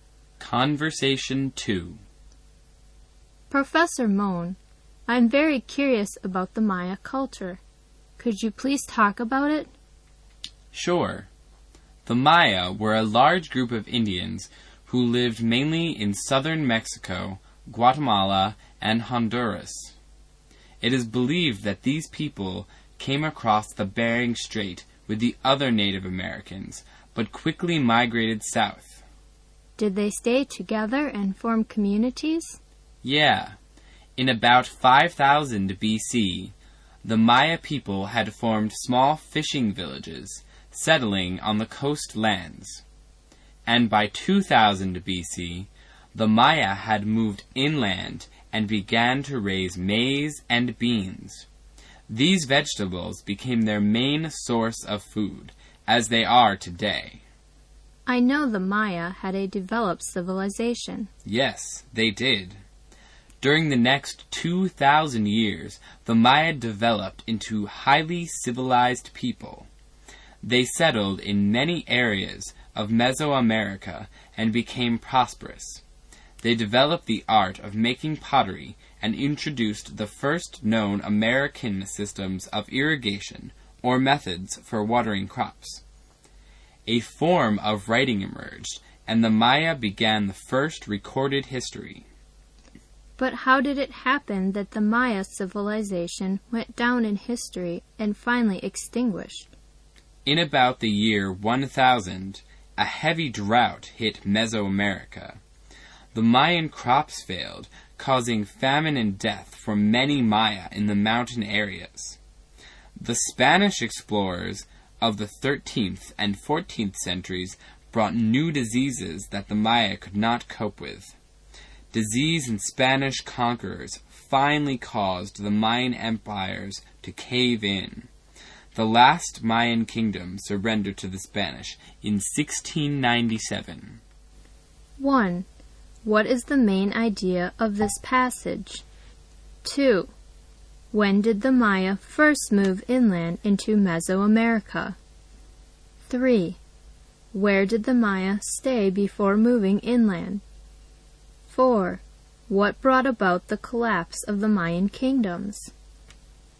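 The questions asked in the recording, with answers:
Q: When did the Maya first move inland into Mesoamerica?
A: By about 2000 BC

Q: Where did the Maya stay before moving inland?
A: In small fishing villages on the coastlands

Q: What brought about the collapse of the Mayan kingdoms?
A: Drought and famine, then disease and the Spanish conquerors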